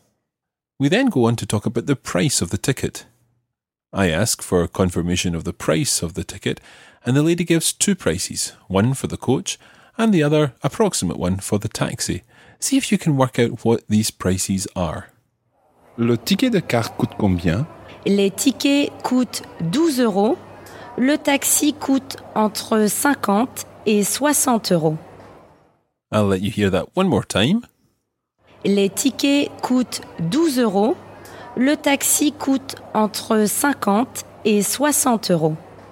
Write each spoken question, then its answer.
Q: See if you can work out what these prices are.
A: So the coach tickets cost 12 euros.